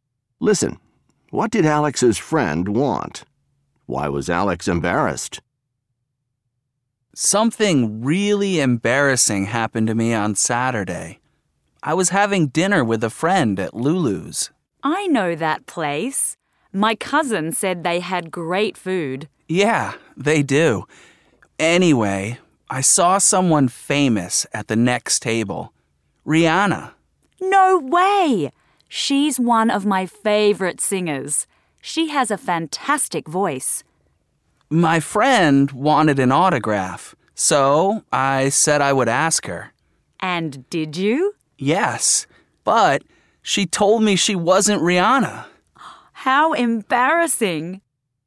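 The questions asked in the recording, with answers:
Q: What did Alex's friend want?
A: An autograph from the woman he thought was Rihanna

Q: Why was Alex embarrassed?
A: The woman he asked told him she wasn't Rihanna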